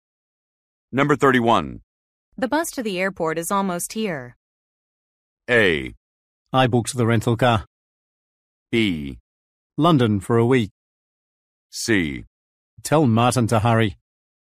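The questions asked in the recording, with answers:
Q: The bus to the airport is almost here.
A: C: Tell Martin to hurry.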